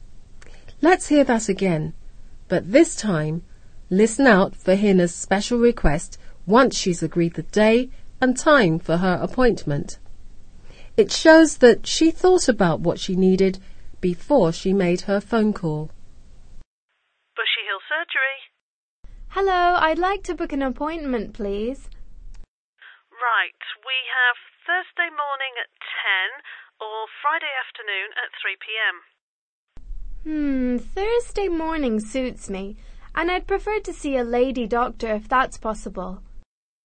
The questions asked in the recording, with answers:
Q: listen out for Hina's special request once she's agreed the day and time for her appointment.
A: Hina decided that she wanted to see a female or a woman doctor, so she said, I'd prefer to see a lady doctor if that's possible.